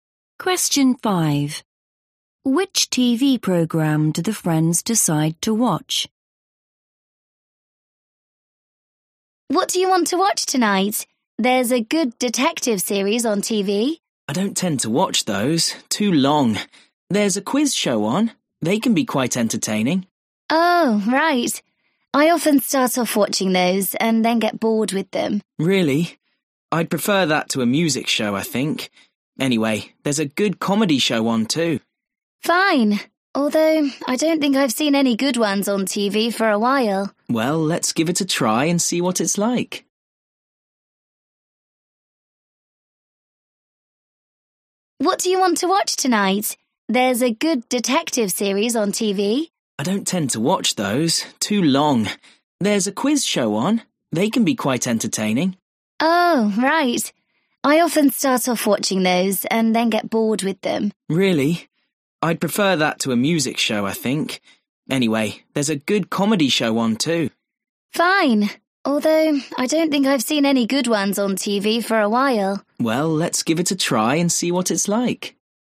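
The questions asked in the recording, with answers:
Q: Which TV program do the friends decide to watch?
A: a comedy show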